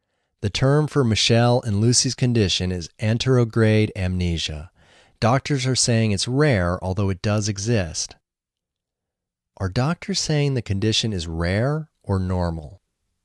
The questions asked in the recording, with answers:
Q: Are doctors saying the condition is rare or normal?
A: Doctors are saying the condition is rare.